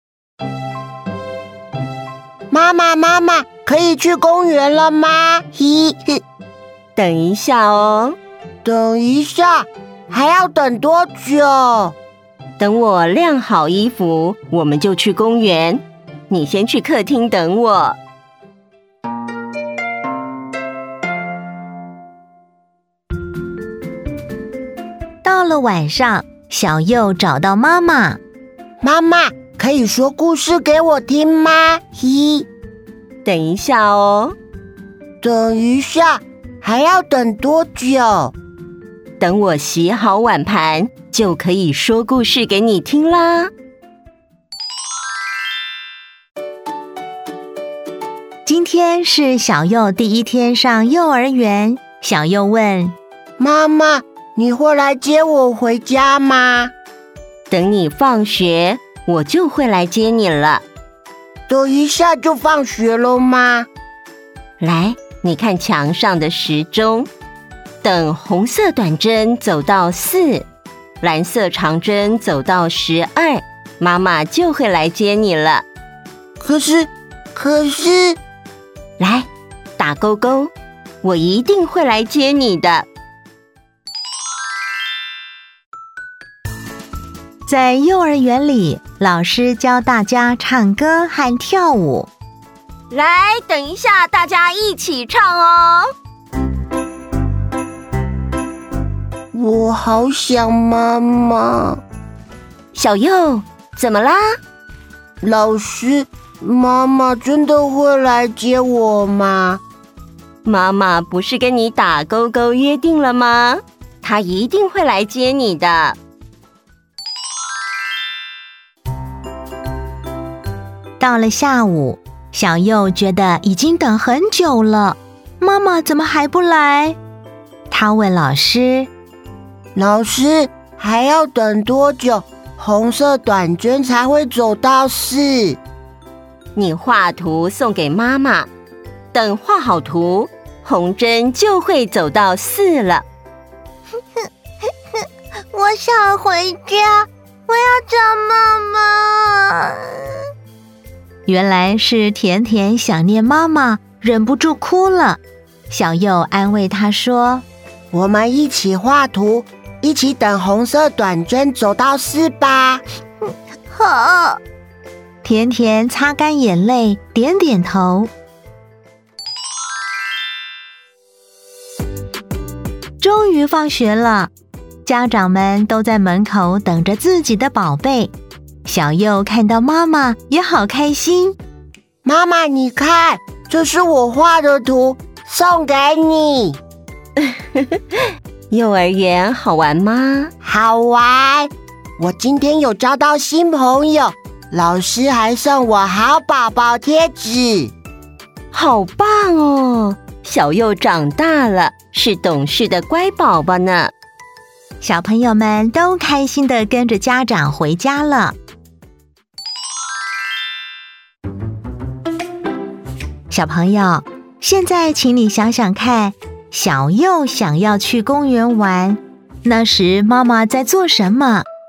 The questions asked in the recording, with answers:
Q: 小朋友,现在请你想想看,小佑想要去公园玩,那时妈妈在做什么?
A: 晾衣服。